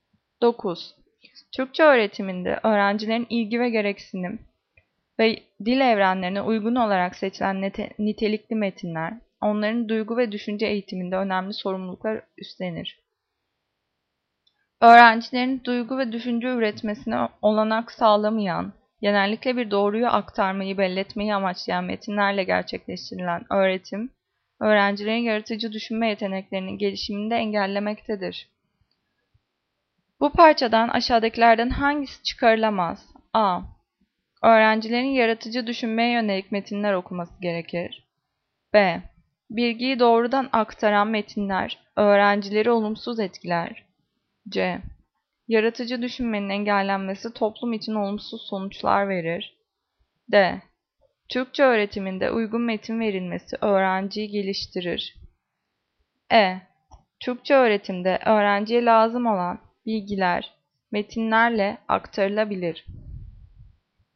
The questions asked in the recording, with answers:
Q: Bu parçadan aşağıdakilerden hangisi çıkarılamaz?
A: Cevap C. Yaratıcı düşünmenin engellenmesi toplum için olumsuz sonuçlar verir.